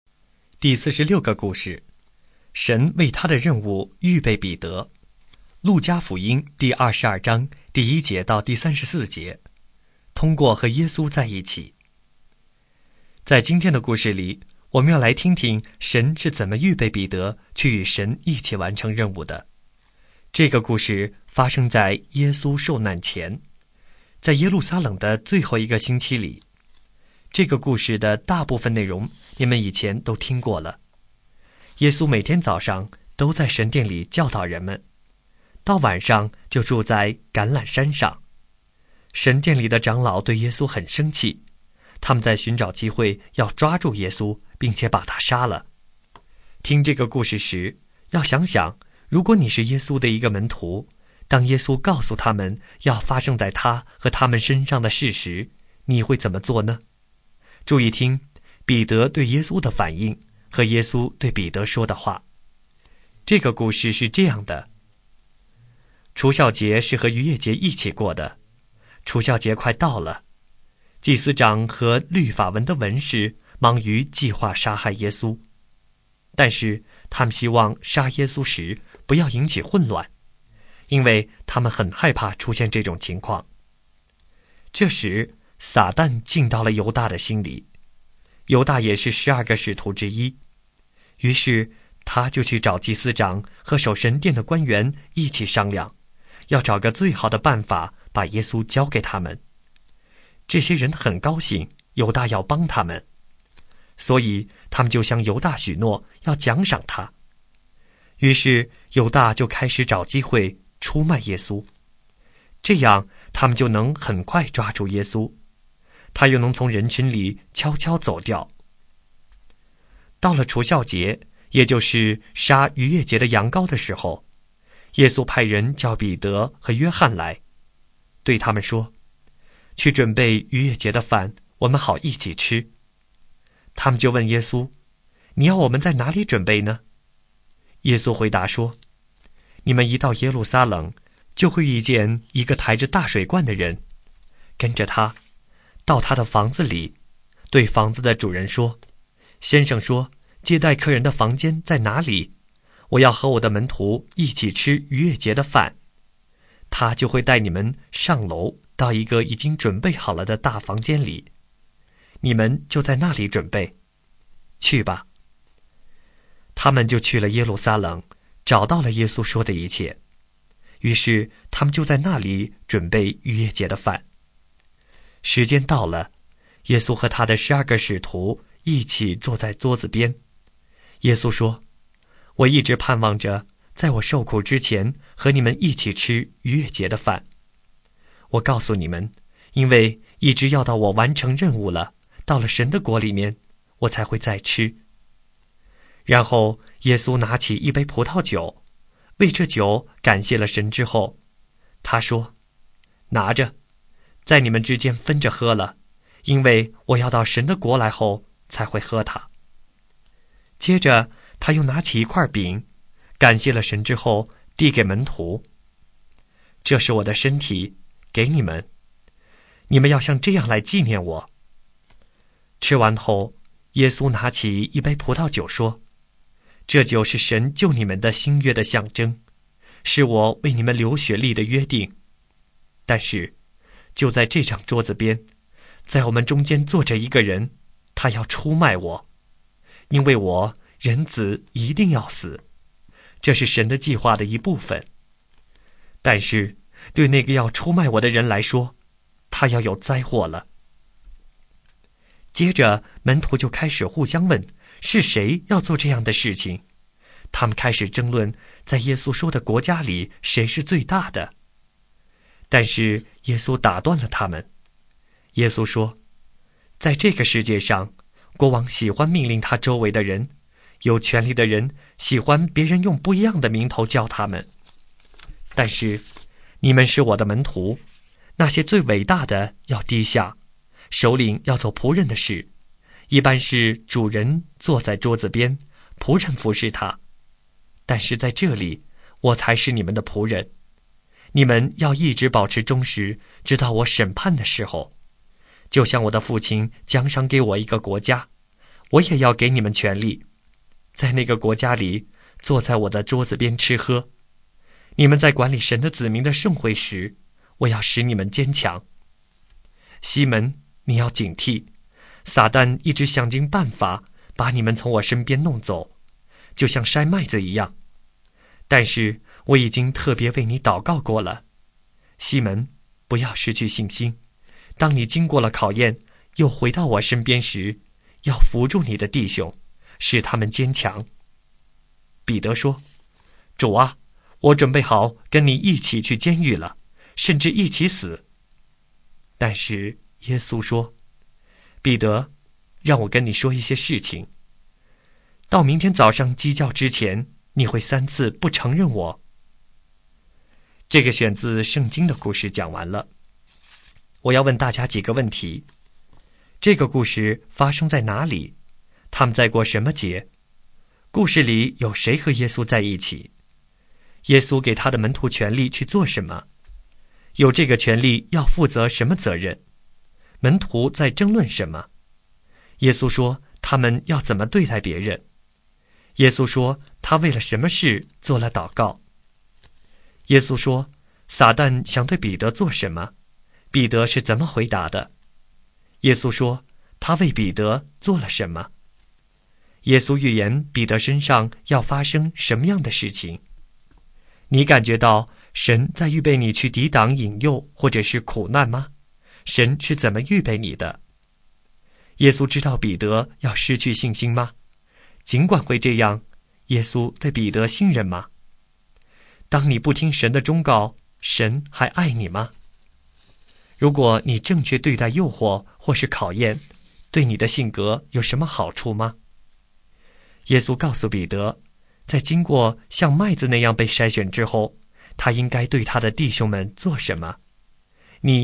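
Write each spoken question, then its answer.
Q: 这个故事发生在哪里?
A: 耶路撒冷

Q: 他们在过什么节?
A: 逾越节(除酵节)

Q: 故事里有谁和耶稣在一起?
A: 他的12个使徒(门徒)

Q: 耶稣给他的门徒权力去做什么?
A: 在神的国里坐在耶稣的桌子边吃喝

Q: 门徒在争论什么?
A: 在耶稣说的国里谁是最大的

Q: 耶稣说他们要怎么对待别人?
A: 最伟大的要低下,首领要做仆人的事,服侍别人

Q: 耶稣说他为了什么事做了祷告?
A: 为西门(彼得)不失去信心

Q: 耶稣说撒旦想对彼得做什么?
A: 把他从耶稣身边弄走,像筛麦子一样筛他

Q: 彼得是怎么回答的?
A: 他准备好跟耶稣一起去监狱,甚至一起死

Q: 耶稣说他为彼得做了什么?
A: 特别为他祷告

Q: 耶稣预言彼得身上要发生什么样的事情?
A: 明天早上鸡叫之前,他会三次不承认耶稣

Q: 耶稣告诉彼得,在经过像麦子那样被筛选之后,他应该对他的弟兄们做什么?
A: 扶住他的弟兄,使他们坚强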